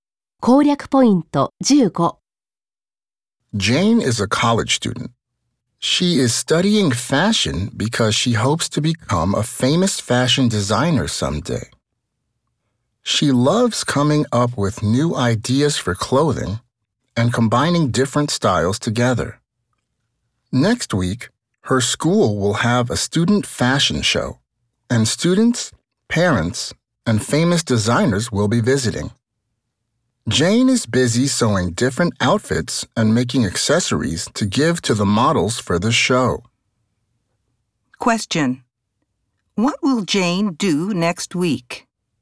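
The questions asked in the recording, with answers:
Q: What will Jane do next week?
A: Show her outfits in her school's student fashion show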